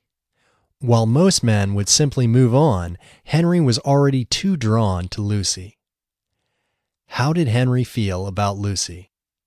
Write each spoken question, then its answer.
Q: How did Henry feel about Lucy?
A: He felt drawn to Lucy.